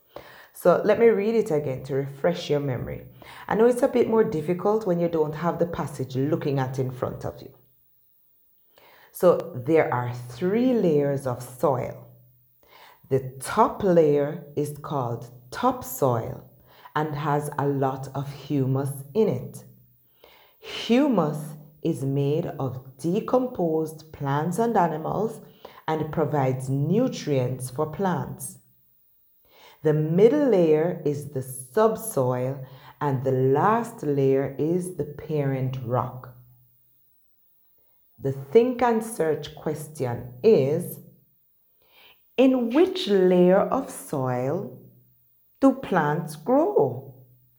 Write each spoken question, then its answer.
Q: in which layer of soil do plants grow?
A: So the layer that plants grow in is the topsoil layer.